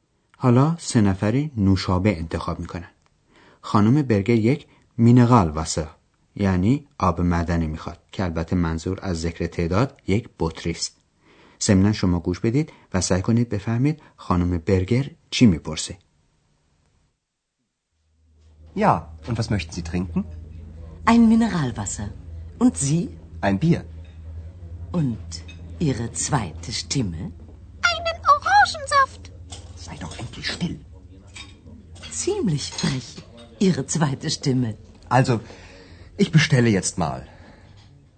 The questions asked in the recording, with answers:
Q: ضمناً شما گوش بدید و سعی کنید بفهمید خانم برگر چی میپرسه.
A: جمله خانم برگر اینه: صدای دوم شما چی؟